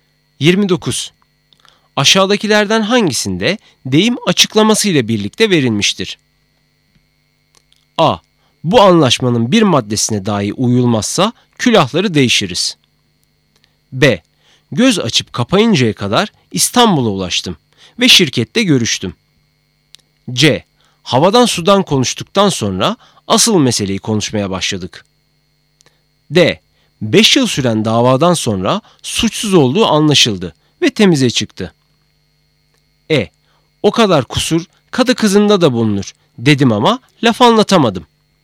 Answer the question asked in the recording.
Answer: Doğru cevap D, 5 yıl süren davadan sonra suçsuz olduğu anlaşıldı ve temize çıktı.